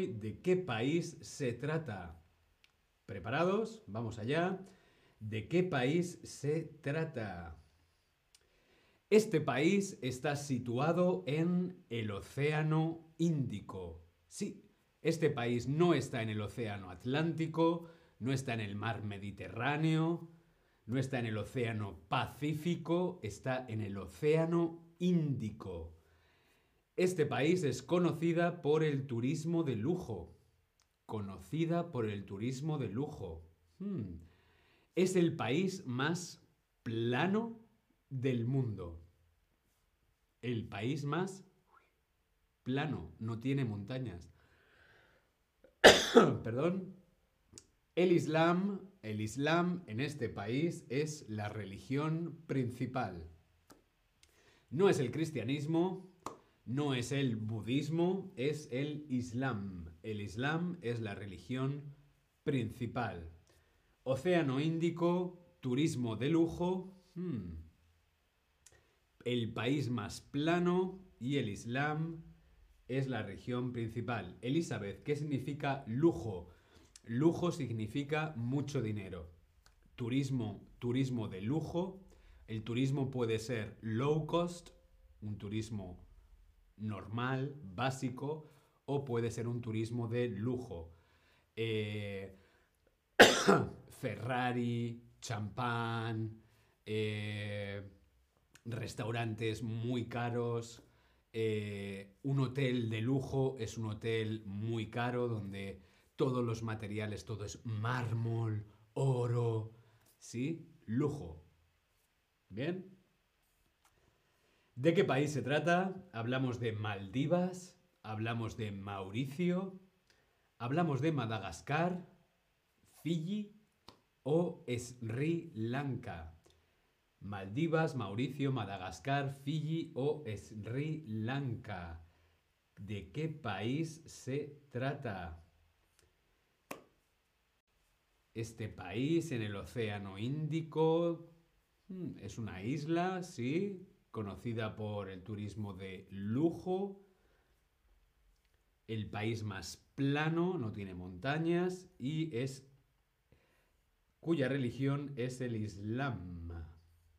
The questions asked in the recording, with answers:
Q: Hablamos de Maldivas, hablamos de Mauricio, hablamos de Madagascar, Fiji o Sri Lanka.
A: Claro que sí, las Islas Maldivas.